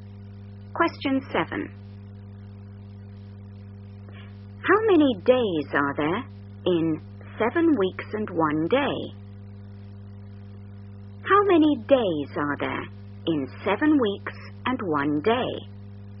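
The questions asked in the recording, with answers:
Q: How many days are there in 7 weeks and 1 day?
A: 50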